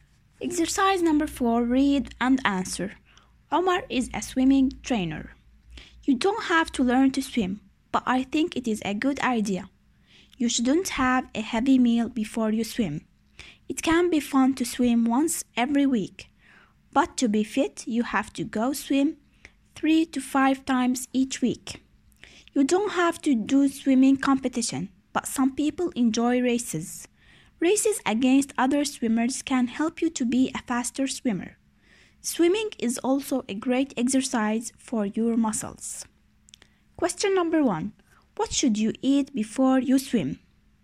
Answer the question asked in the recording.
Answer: you shouldn't have a heavy meal.